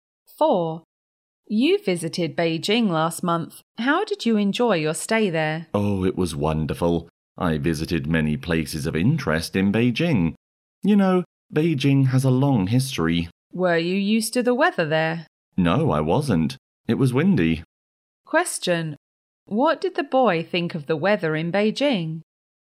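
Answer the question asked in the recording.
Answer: It was windy and he wasn't used to it.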